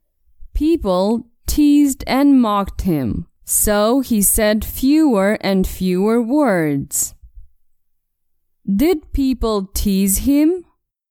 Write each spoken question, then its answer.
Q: Did people tease him?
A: Yes, people teased him.